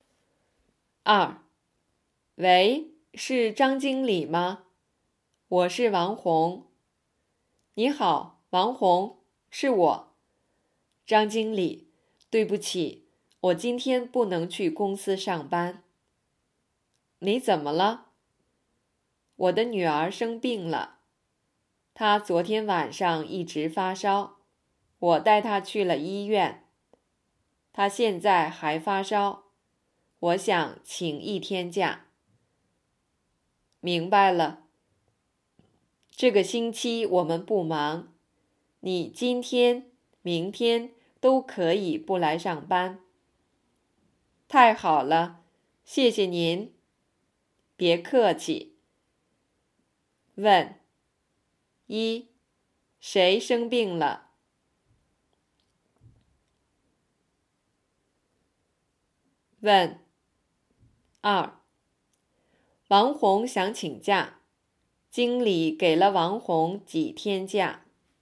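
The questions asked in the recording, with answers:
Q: 谁生病了?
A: 王红的女儿

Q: 王红想请假,经理给了王红几天假?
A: 两天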